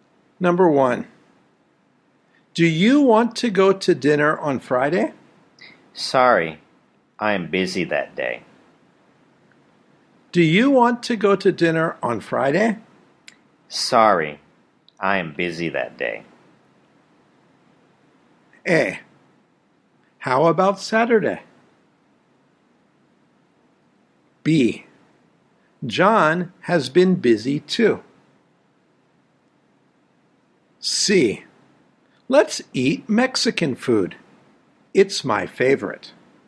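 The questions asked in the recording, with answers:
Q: Do you want to go to dinner on Friday?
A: A: How about Saturday?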